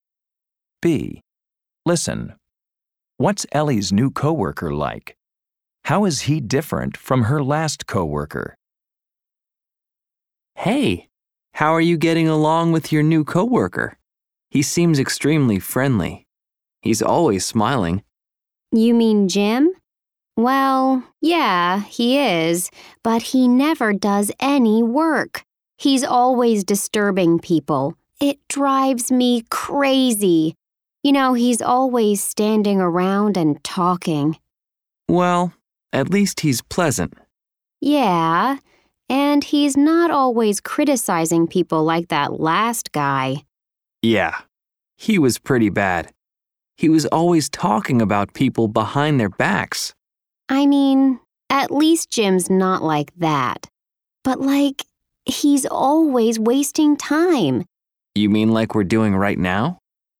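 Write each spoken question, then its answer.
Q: What's Ellie's new coworker like?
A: Friendly and always smiling, but he never does any work; he's always disturbing people and wasting time

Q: How is he different from her last coworker?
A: He doesn't criticize people or talk about them behind their backs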